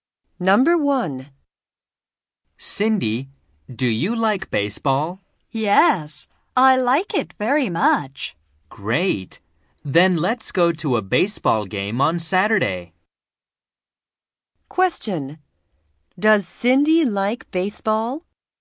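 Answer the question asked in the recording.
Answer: Yes, she does.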